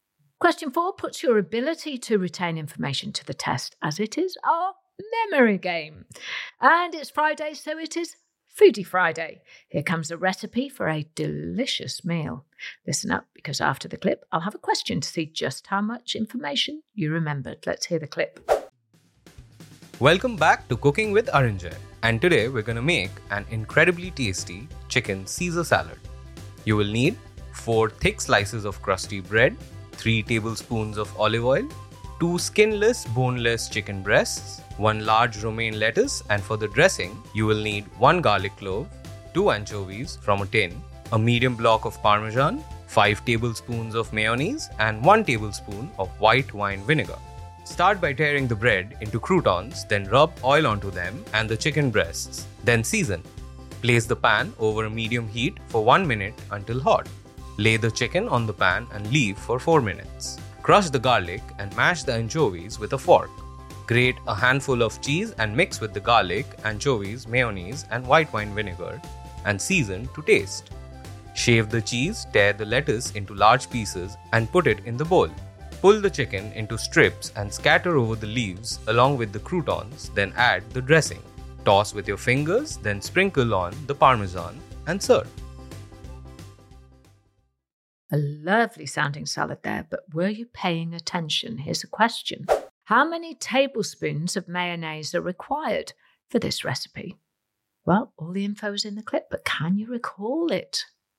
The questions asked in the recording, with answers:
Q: How many tablespoons of mayonnaise are required for this recipe?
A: It was five tablespoons of mayonnaise.